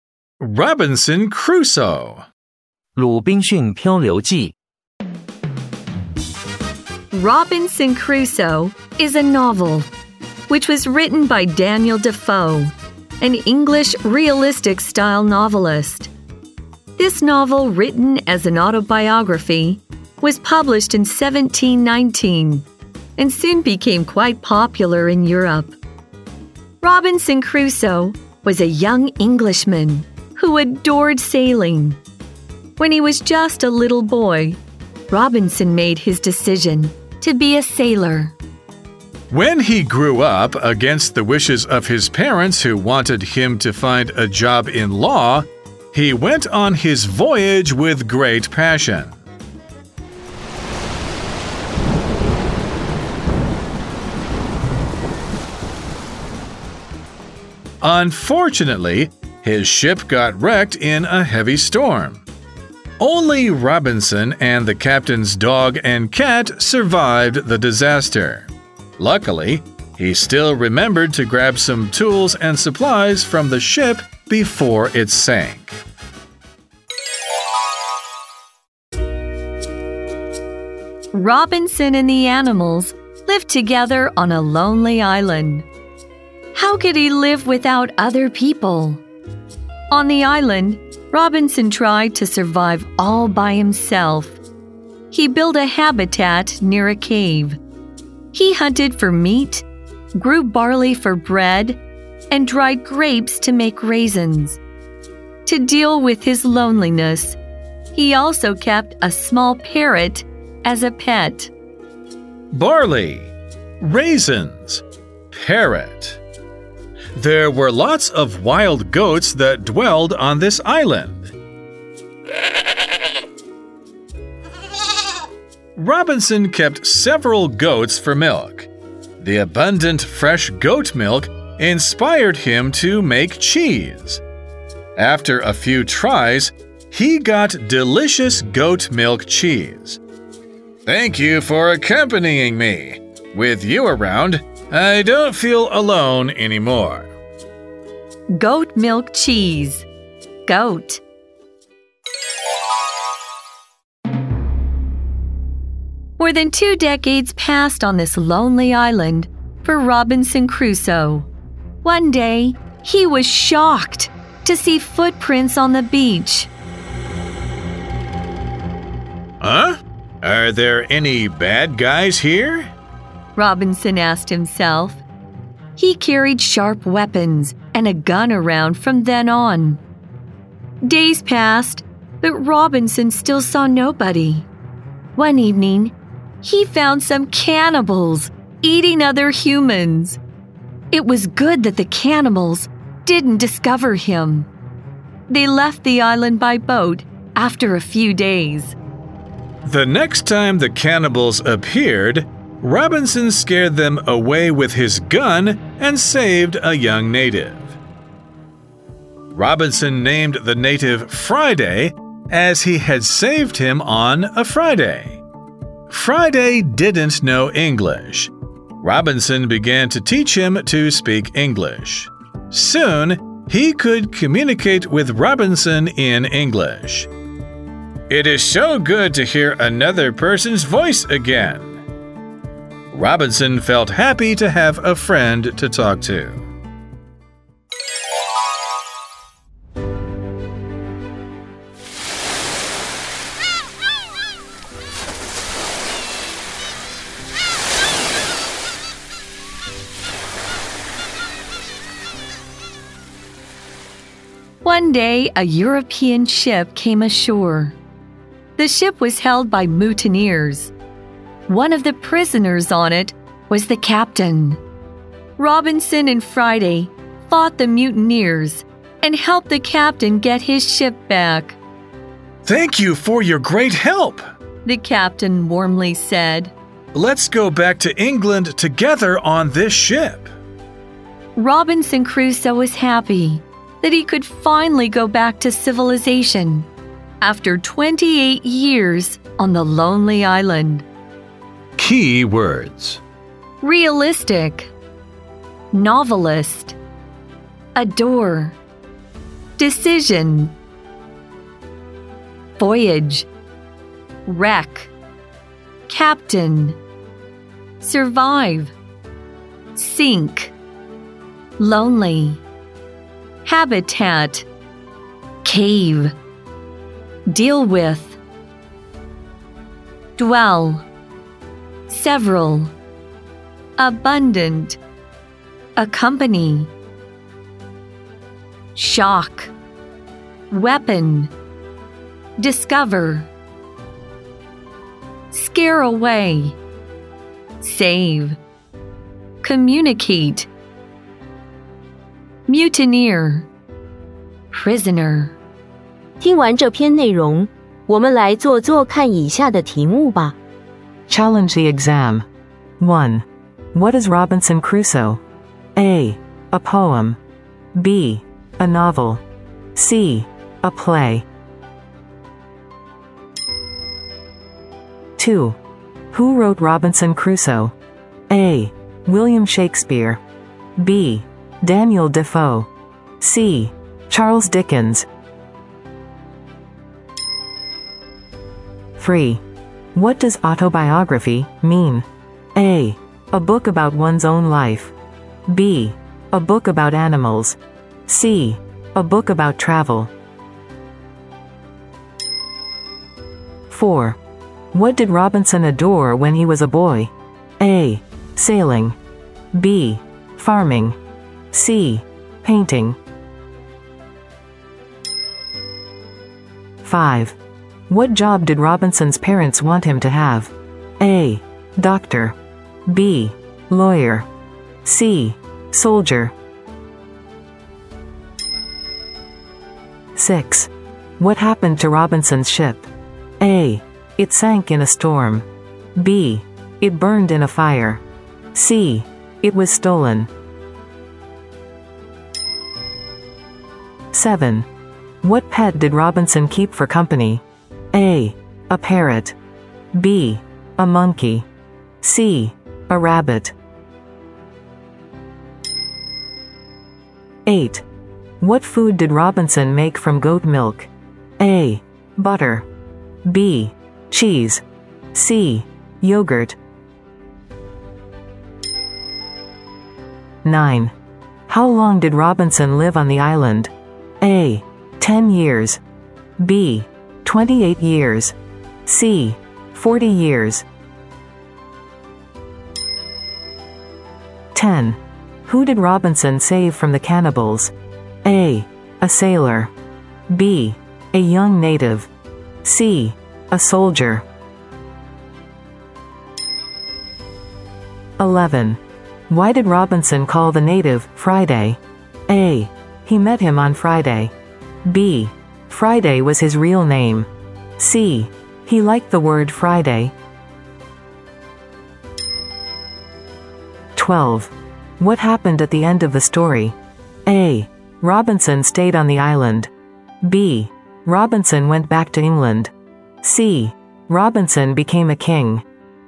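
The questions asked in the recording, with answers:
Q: What is Robinson Crusoe?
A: B: A novel.

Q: Who wrote Robinson Crusoe?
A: B: Daniel Defoe.

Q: What did Robinson adore when he was a boy?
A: A: Sailing.

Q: What job did Robinson's parents want him to have?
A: B: Lawyer.

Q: What happened to Robinson's ship?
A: A: It sank in a storm.

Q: What pet did Robinson keep for company?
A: A: A parrot.

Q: What food did Robinson make from goat milk?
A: B: Cheese.

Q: How long did Robinson live on the island?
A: B: 28 years.

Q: Who did Robinson save from the cannibals?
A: B: A young native.

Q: Why did Robinson call the native Friday?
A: A: He met him on Friday.

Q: What happened at the end of the story?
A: B: Robinson went back to England.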